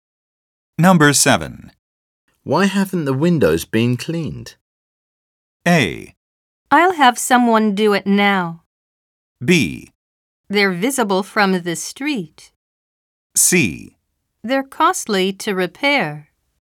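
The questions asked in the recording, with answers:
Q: Why haven't the windows been cleaned?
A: A: I'll have someone do it now.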